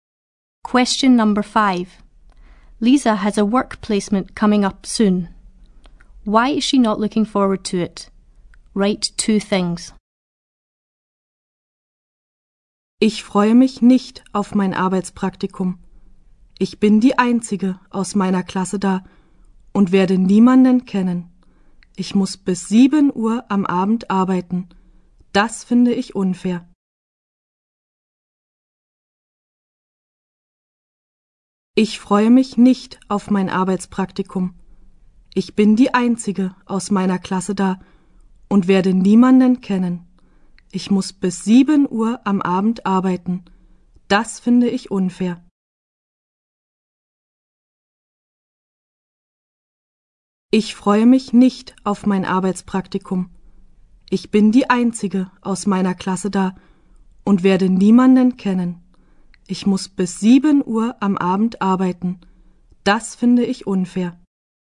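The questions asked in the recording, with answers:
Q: Why is she not looking forward to it?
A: She is the only one from her class there and won't know anyone; she has to work until 7 in the evening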